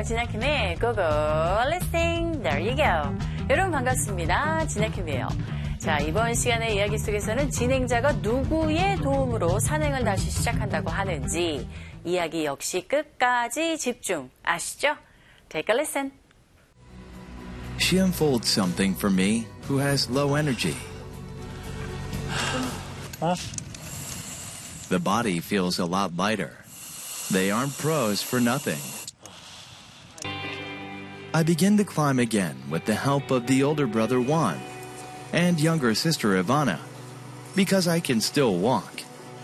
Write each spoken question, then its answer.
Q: 진행자가 누구의 도움으로 산행을 다시 시작한다고 하는지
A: 네, 바로 그 가족들 후안과 이바나의 도움으로 산행을 다시 시작합니다.